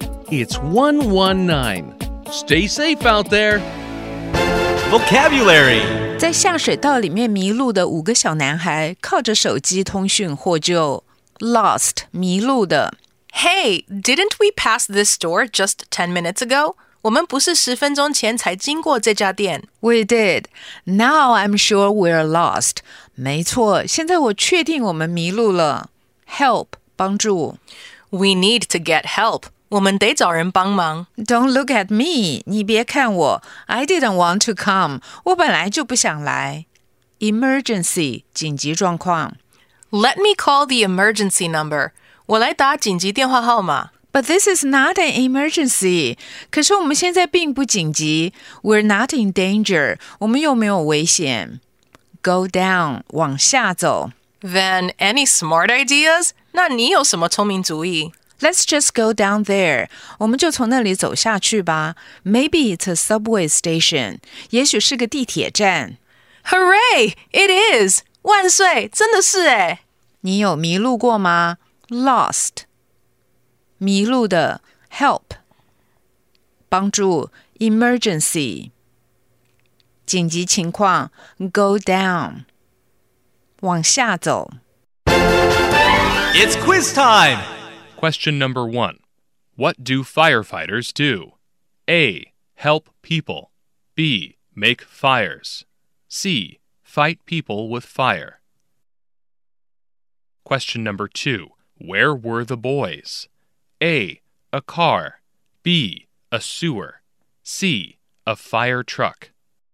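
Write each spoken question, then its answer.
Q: What do firefighters do?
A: A: Help people.

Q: Where were the boys?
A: B: A sewer.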